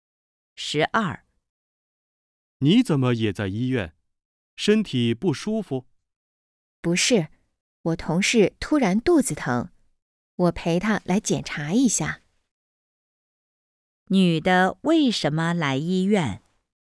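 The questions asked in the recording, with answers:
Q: 女的为什么来医院?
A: 陪同事来检查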